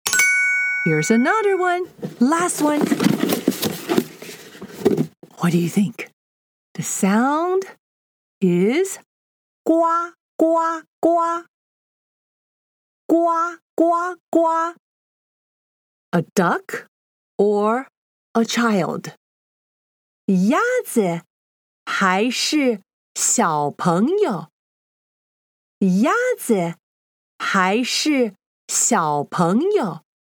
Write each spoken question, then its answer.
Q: A duck or a child?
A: You're right again. It's a duck.